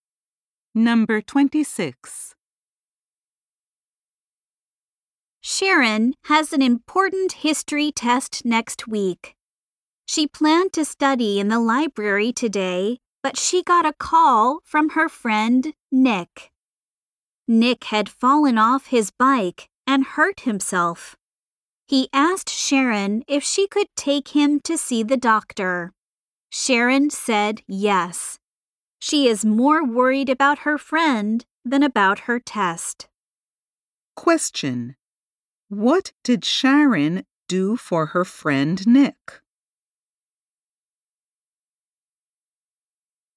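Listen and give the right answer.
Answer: She took him to see the doctor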